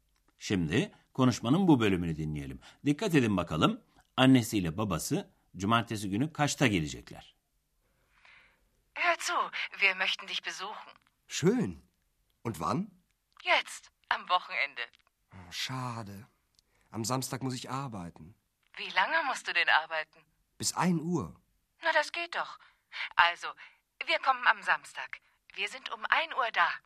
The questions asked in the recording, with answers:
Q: Dikkat edin bakalım annesiyle babası cumartesi günü kaçta gelecekler?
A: annesi cumartesi günü saat 1'de Aachen'da Andreas'ın çalıştığı otelde olacaklarını söylüyor.